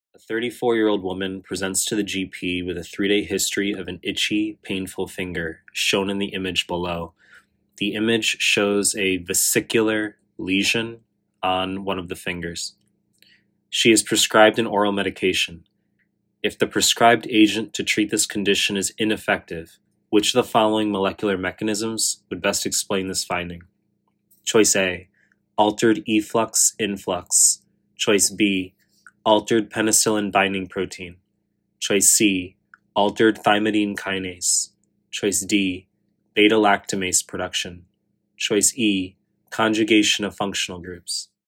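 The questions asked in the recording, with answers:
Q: If the prescribed agent to treat this condition is ineffective, which of the following molecular mechanisms would best explain this finding?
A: C: altered thymidine kinase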